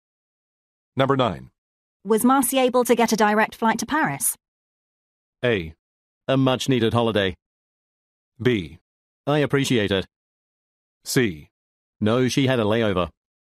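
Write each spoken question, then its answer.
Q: Was Marcy able to get a direct flight to Paris?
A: C: No, she had a layover.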